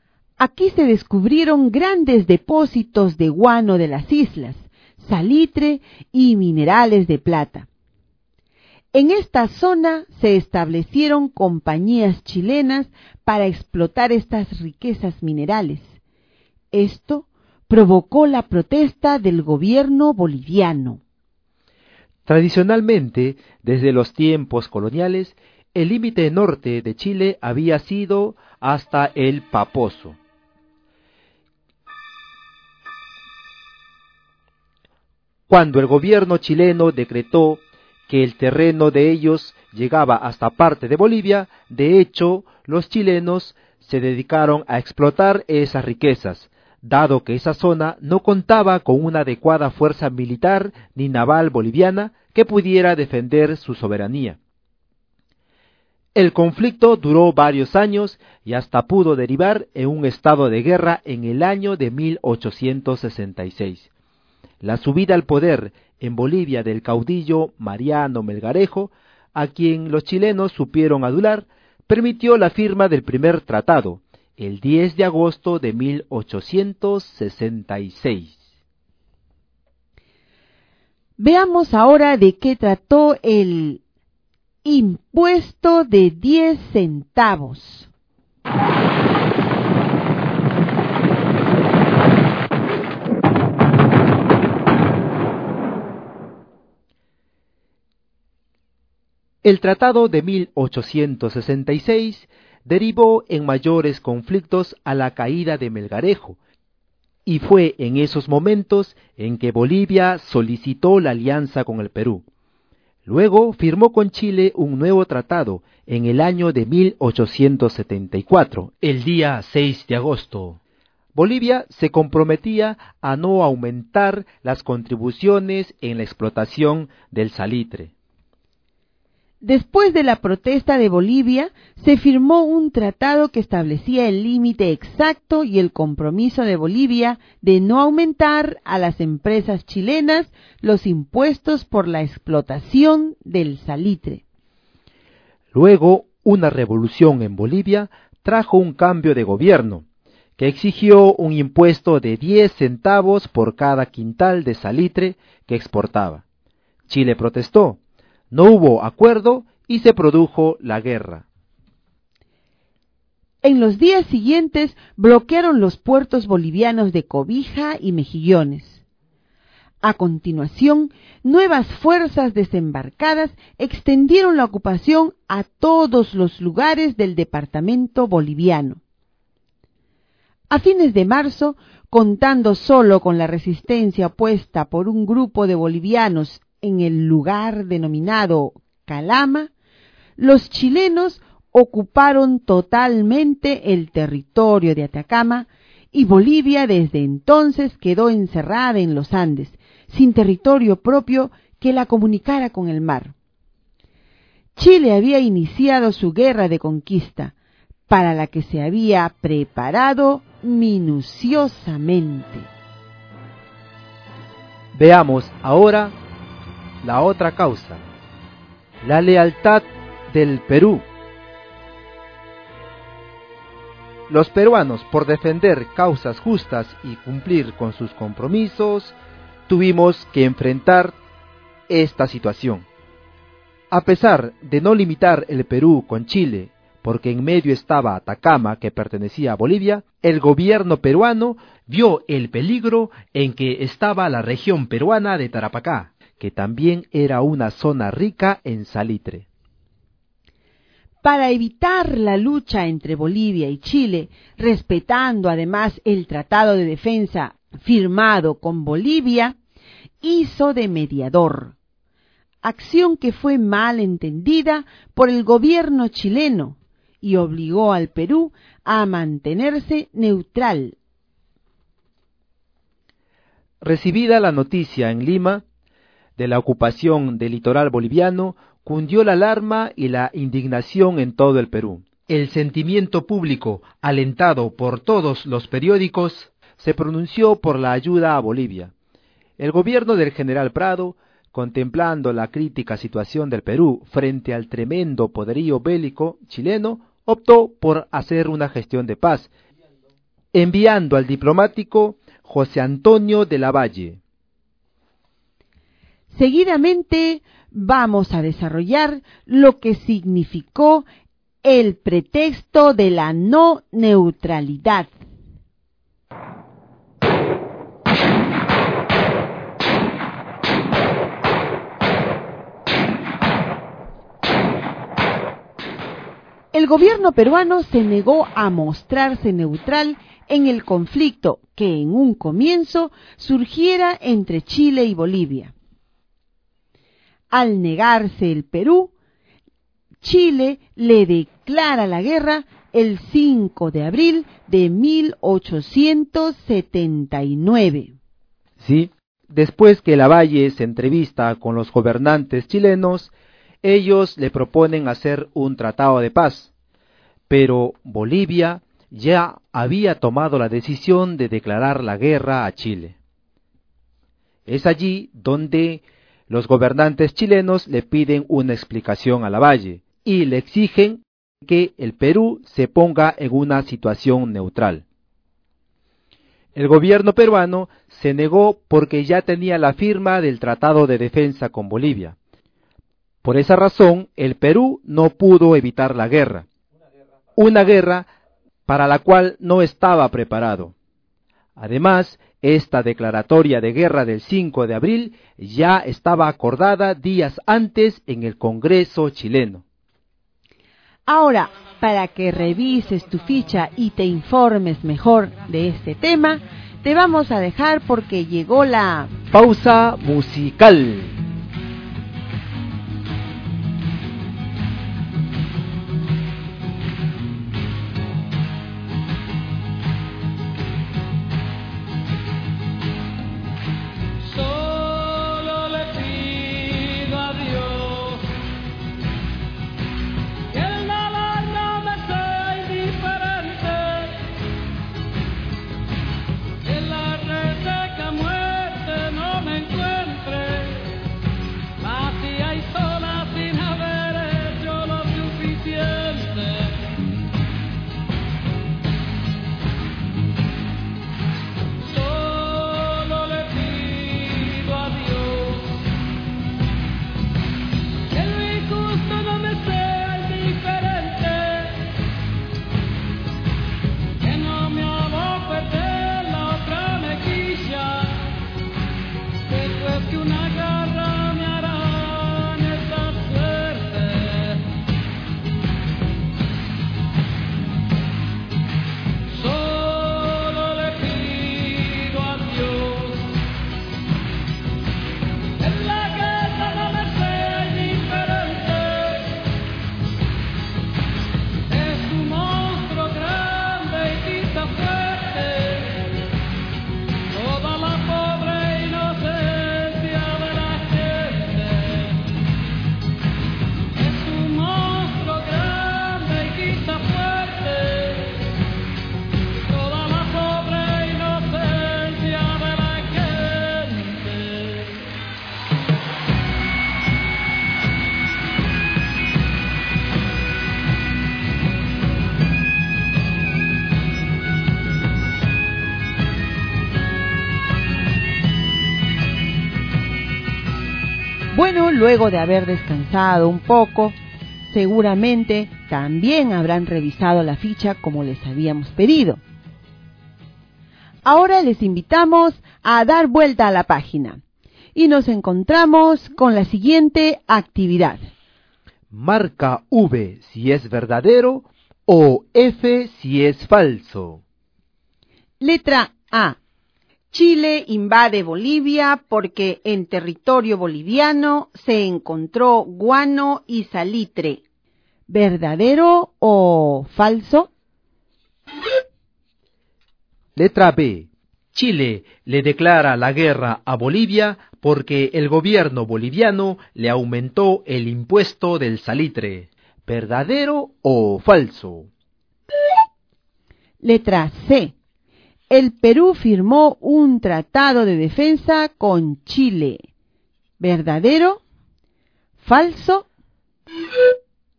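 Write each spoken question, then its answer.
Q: Chile le declara la guerra a Bolivia porque el gobierno boliviano le aumentó el impuesto del salitre. ¿Verdadero o falso?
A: Verdadero

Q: El Perú firmó un tratado de defensa con Chile. ¿Verdadero? ¿Falso?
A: Falso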